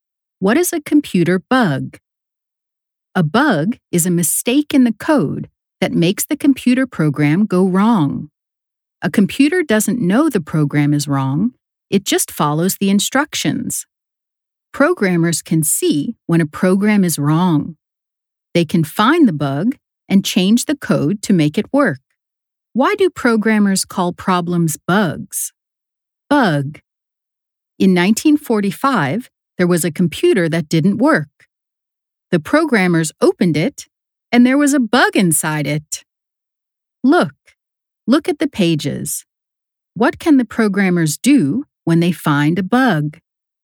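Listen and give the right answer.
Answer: They can find the bug and change the code to make it work.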